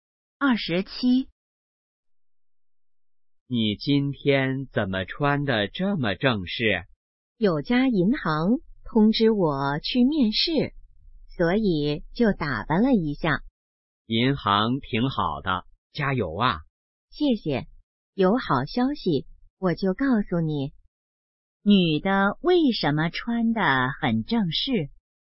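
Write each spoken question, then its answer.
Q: 女的为什么穿得很正式?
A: 要去银行面试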